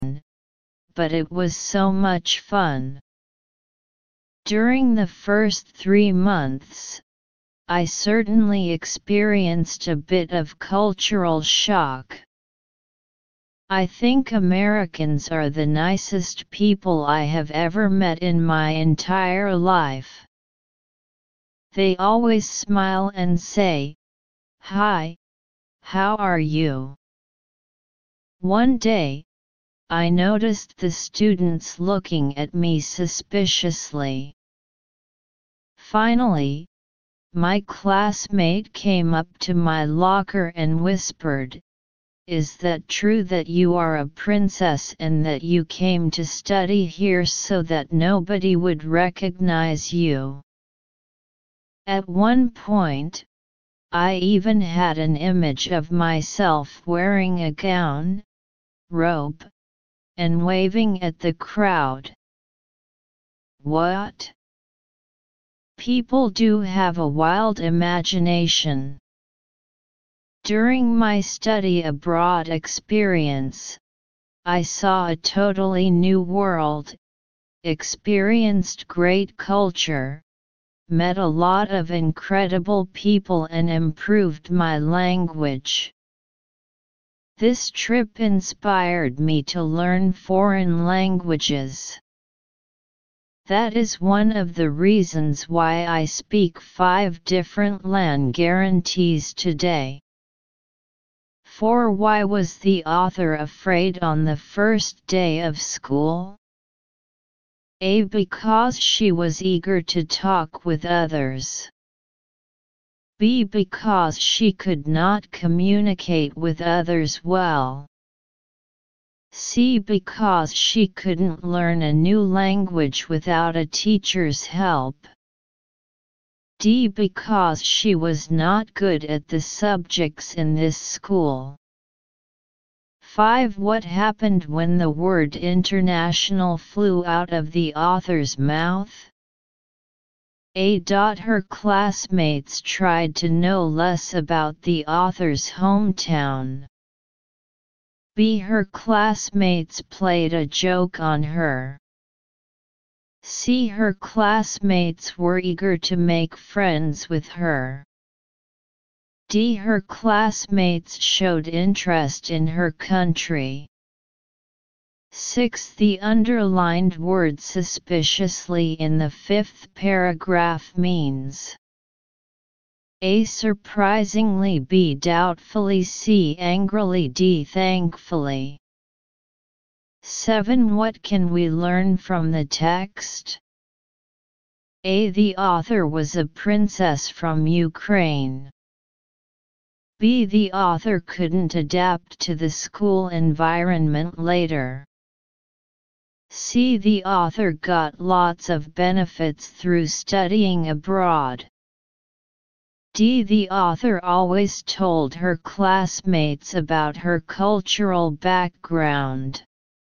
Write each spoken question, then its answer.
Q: The underlined word suspiciously in the 5th paragraph means A.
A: 6. B.

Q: What can we learn from the text?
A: 7. C.